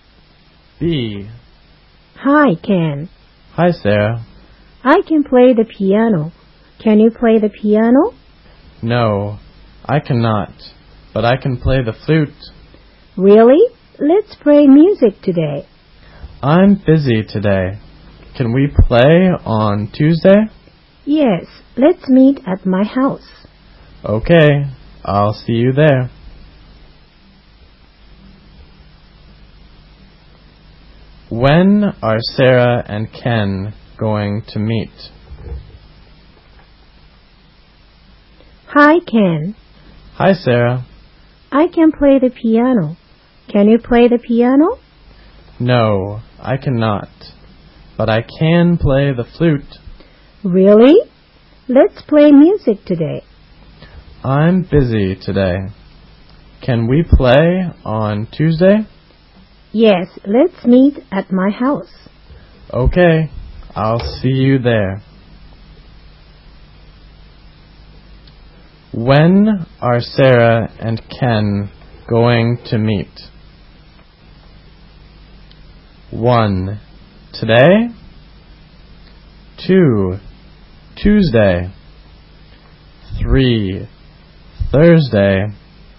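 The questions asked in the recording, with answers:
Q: When are Sarah and Ken going to meet?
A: 2: Tuesday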